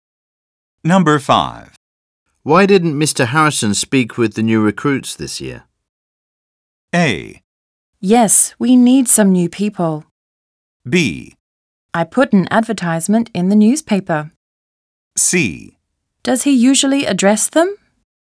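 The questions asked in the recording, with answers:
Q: Why didn't Mr. Harrison speak with the new recruits this year?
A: C: Does he usually address them?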